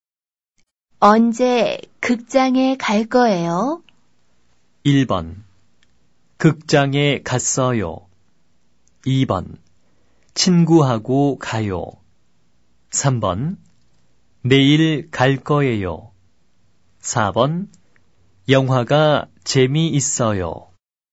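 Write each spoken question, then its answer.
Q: 언제 극장에 갈 거예요?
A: 3: 내일 갈 거예요.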